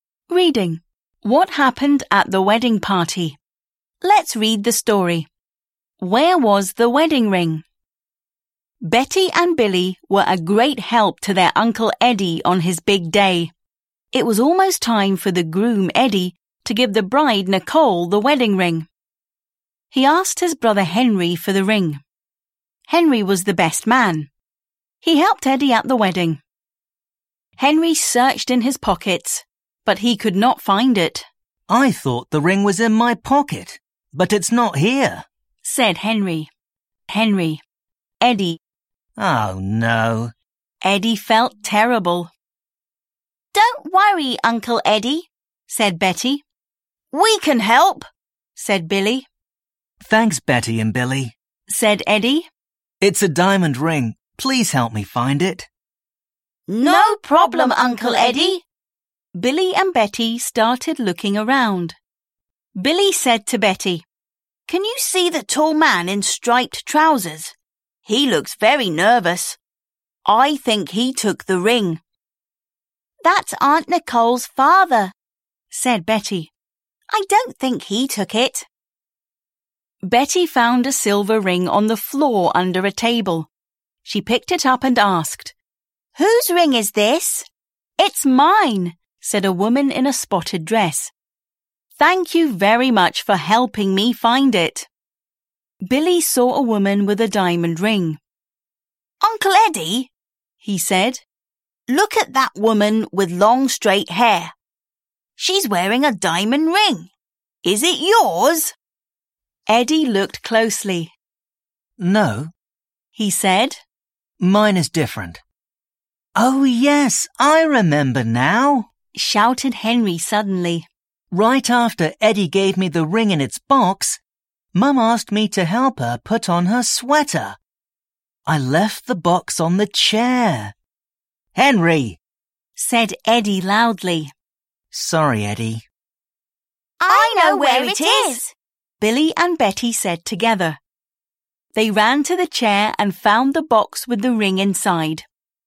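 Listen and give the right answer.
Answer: In its box on the chair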